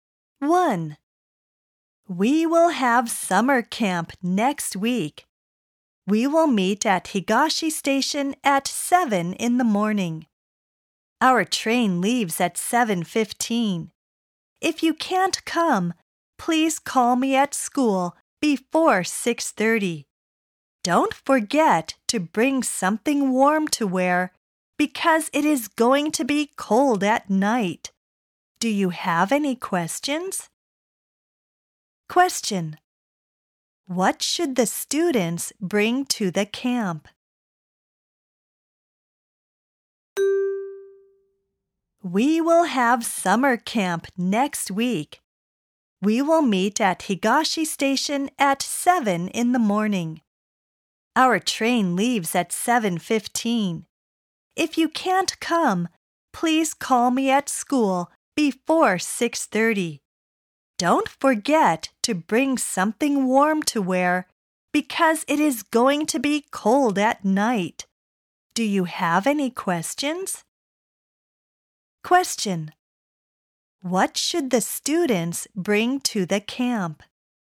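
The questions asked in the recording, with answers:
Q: What should the students bring to the camp?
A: Something warm to wear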